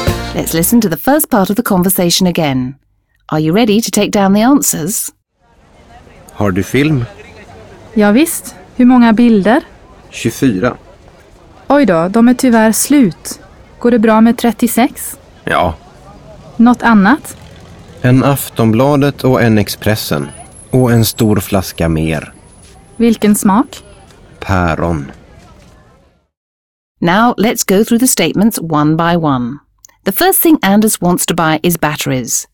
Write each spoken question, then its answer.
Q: The first thing Anders wants to buy is batteries.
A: False. The first thing Anders wants to buy is film for his camera.